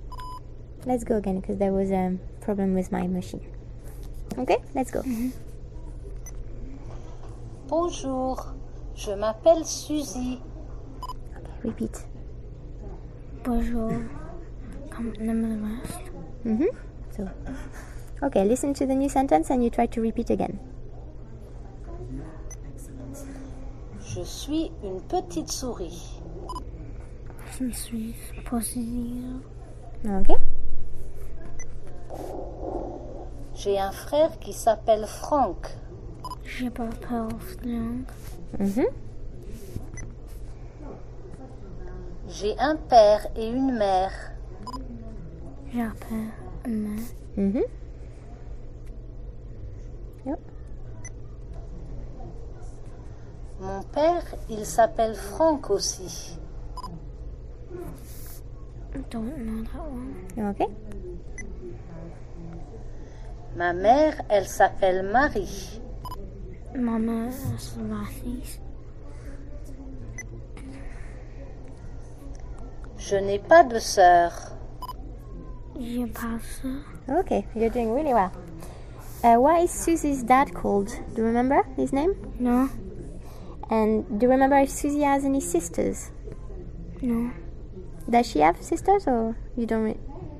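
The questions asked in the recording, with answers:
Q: Why is Susie's dad called?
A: Franck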